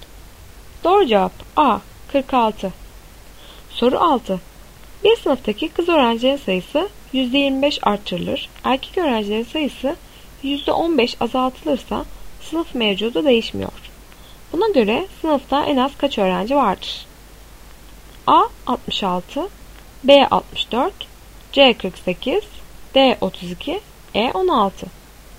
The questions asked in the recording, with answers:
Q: Buna göre sınıfta en az kaç öğrenci vardır?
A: Doğru cevap D 32.